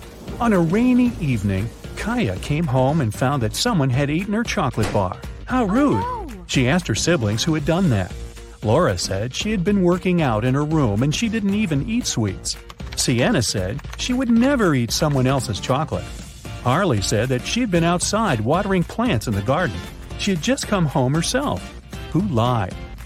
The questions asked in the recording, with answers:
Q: Who lied?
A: I'd say it was Harley.